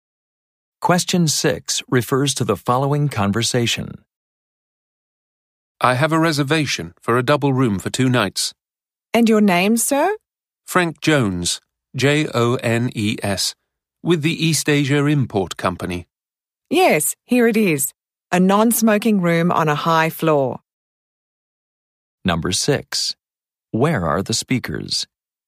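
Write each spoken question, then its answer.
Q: Where are the speakers?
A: At a hotel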